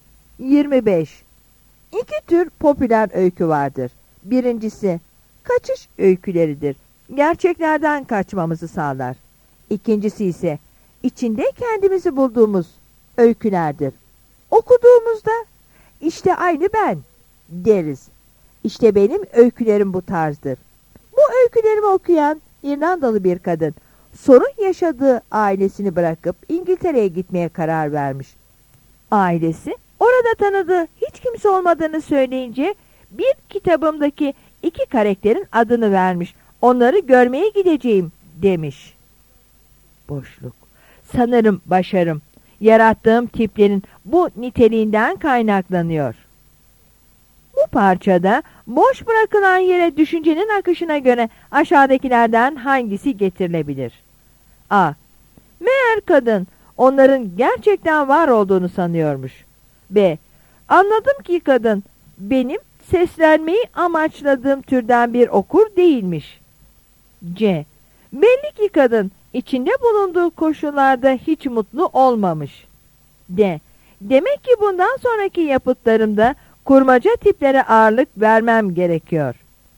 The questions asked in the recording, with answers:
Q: Bu parçada boş bırakılan yere düşüncenin akışına göre aşağıdakilerden hangisi getirilebilir?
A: Yanıt A'dır.